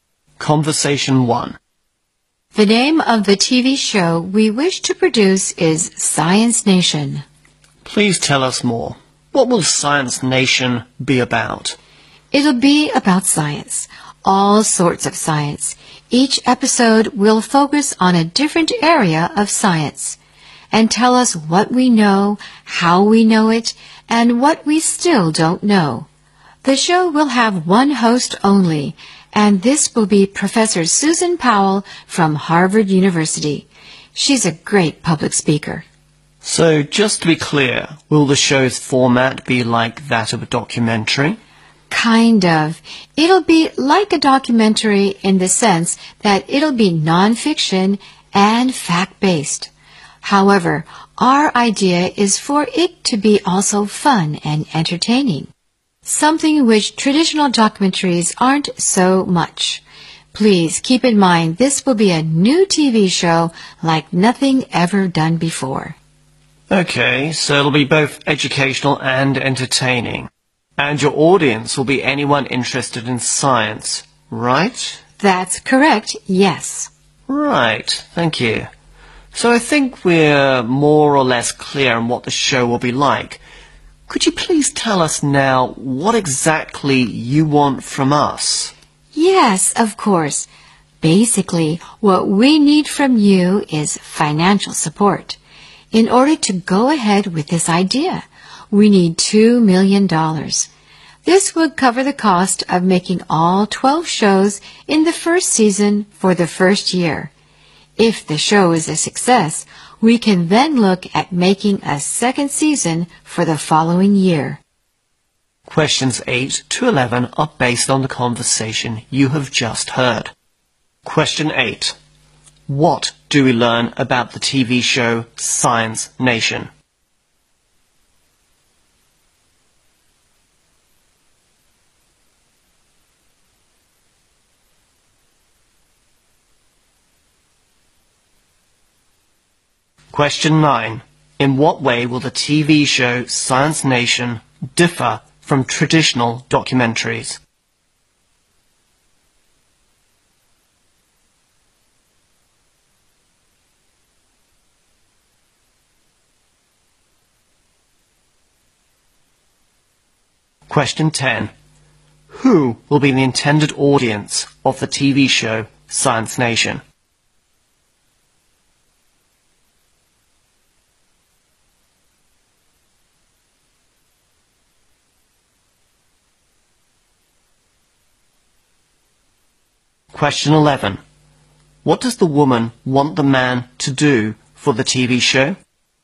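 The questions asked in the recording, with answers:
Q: In what way will the TV show Science Nation differ from traditional documentaries?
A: It will be fun and entertaining

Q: Who will be the intended audience of the TV show Science Nation?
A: Anyone interested in science

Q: What does the woman want the man to do for the TV show?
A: Provide financial support ($2 million)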